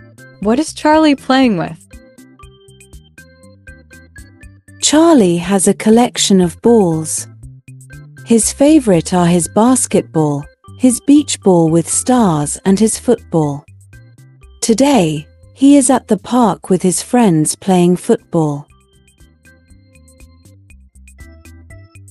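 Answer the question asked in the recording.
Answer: football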